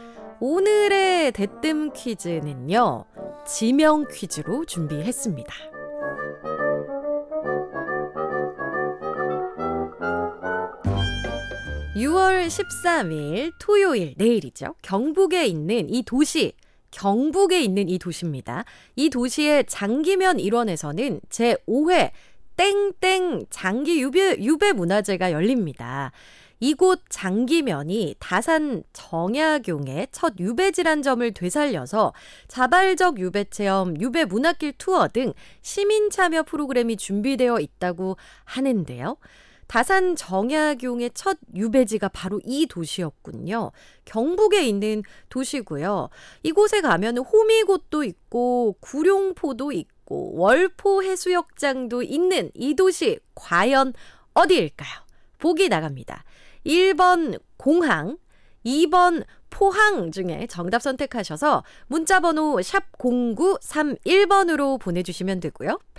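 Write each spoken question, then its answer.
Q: 경북에 있는 도시고요. 이곳에 가면 호미곶도 있고 구룡포도 있고 월포해수욕장도 있는 이 도시 과연 어디일까요?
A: 2번: 포항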